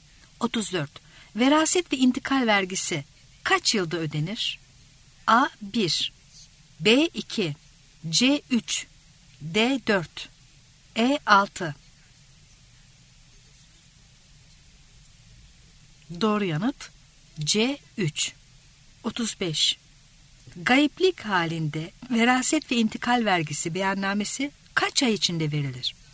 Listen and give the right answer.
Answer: Doğru yanıt C. 3.